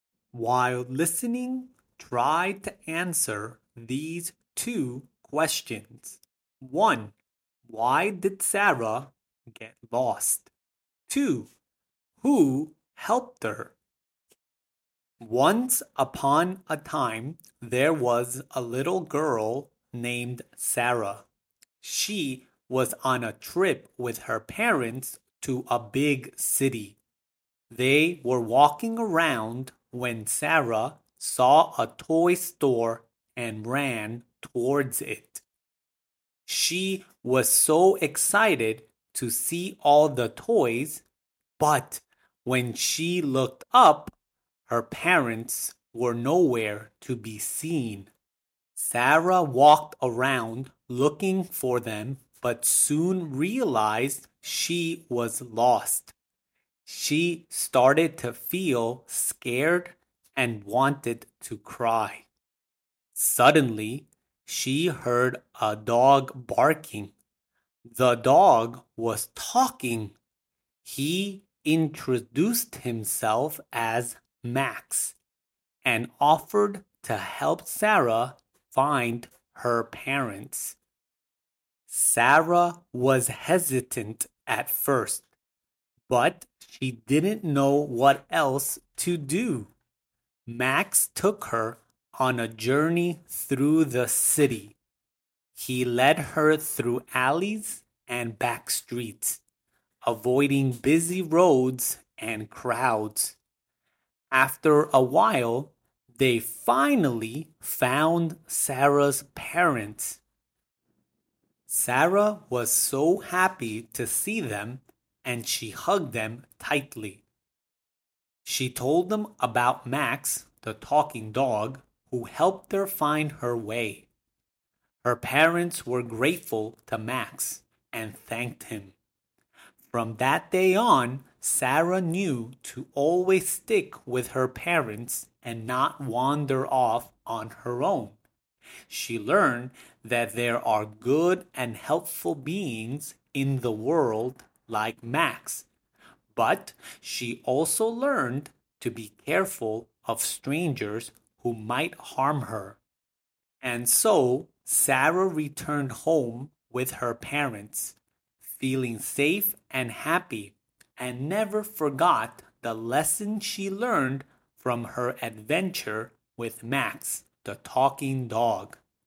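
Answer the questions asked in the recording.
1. She ran to a toy store and lost sight of her parents.
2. Max, a talking dog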